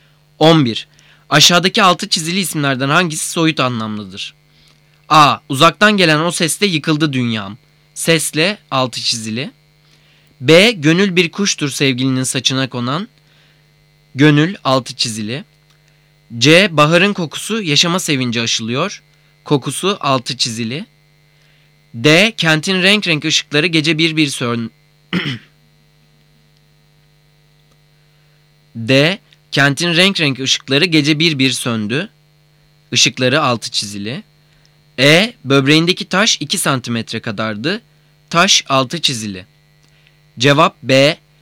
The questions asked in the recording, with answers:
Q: Aşağıdaki altı çizili isimlerden hangisi soyut anlamlıdır?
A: Cevap B.